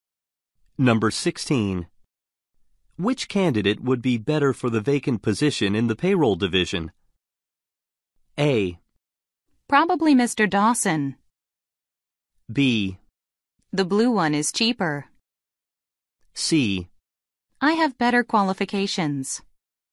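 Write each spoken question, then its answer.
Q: Which candidate would be better for the vacant position in the payroll division?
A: A: Probably Mr. Dawson.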